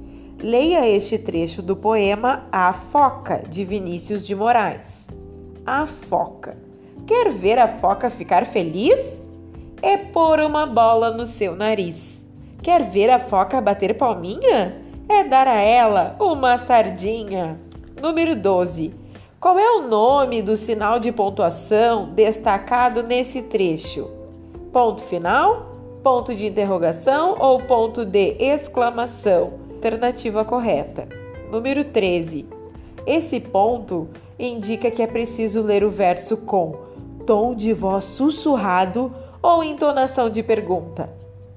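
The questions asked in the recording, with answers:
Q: Esse ponto indica que é preciso ler o verso com tom de voz sussurrado ou entonação de pergunta.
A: Entonação de pergunta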